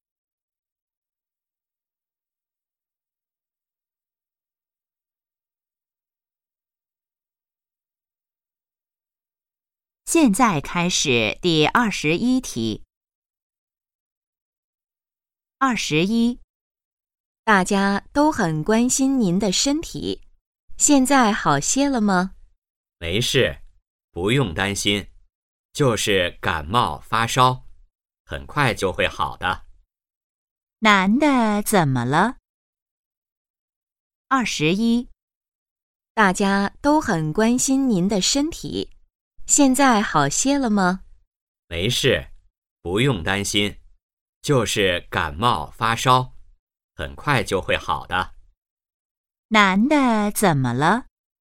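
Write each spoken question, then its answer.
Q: 男的怎么了?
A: 感冒发烧了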